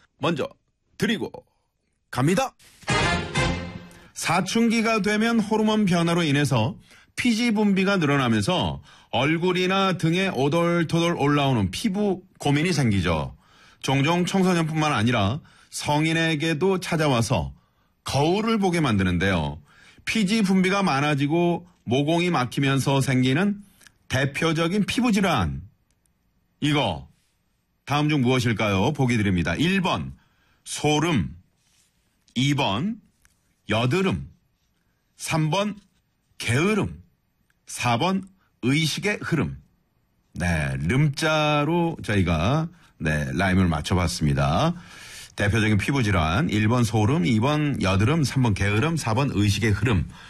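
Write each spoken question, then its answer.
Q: 이거 다음 중 무엇일까요?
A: 2: 여드름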